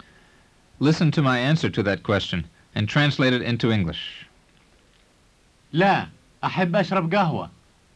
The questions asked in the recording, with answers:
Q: Listen to my answer to that question and translate it into English. لا, أحب أشرب قهوة.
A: It means, no, I would like to drink coffee.